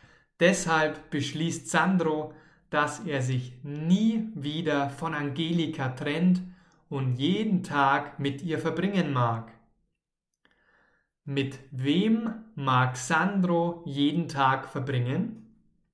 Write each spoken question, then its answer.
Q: Mit wem mag Sandro jeden Tag verbringen?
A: Mit Angelika natürlich, mit seiner neuen Freundin.